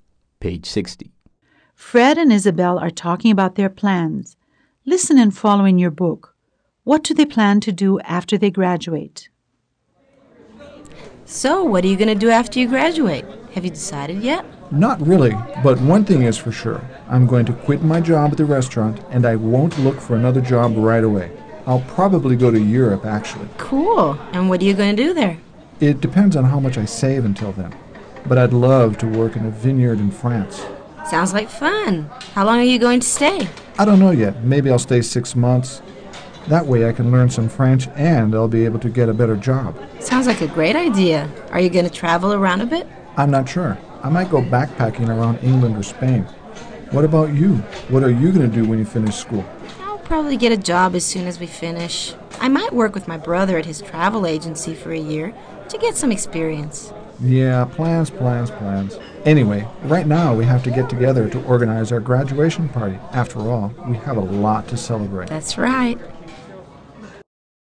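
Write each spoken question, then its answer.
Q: What do they plan to do after they graduate?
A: One will quit the restaurant job and go to Europe, maybe working in a vineyard in France; the other will get a job right away, maybe at a brother's travel agency.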